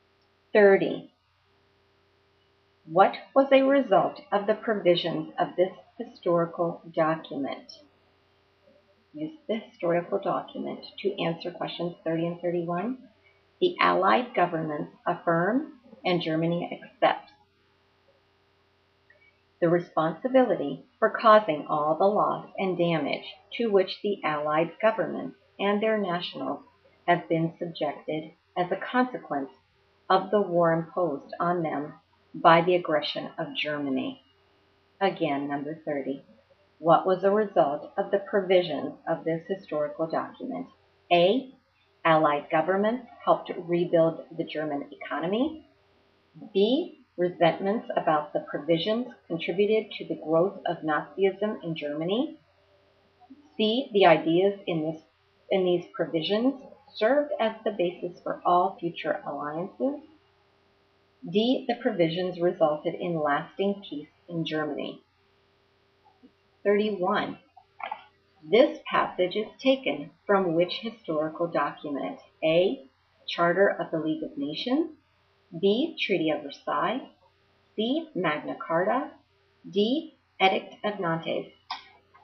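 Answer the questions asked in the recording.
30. B: Resentments about the provisions contributed to the growth of Nazism in Germany.
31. B: Treaty of Versailles.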